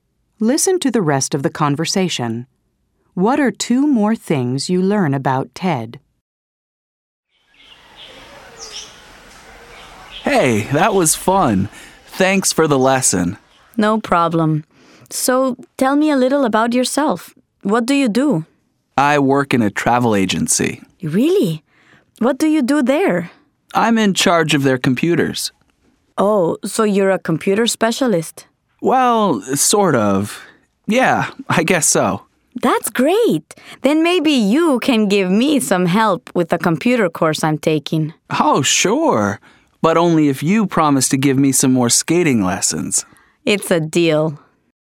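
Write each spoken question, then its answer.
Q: What are two more things you learn about Ted?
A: He works in a travel agency and is in charge of its computers (a kind of computer specialist).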